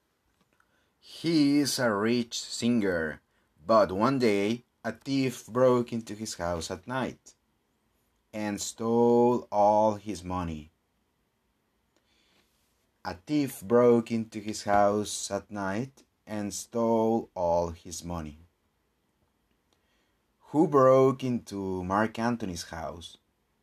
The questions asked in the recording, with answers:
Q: Who broke into Mark Anthony's house?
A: A thief broke into his house.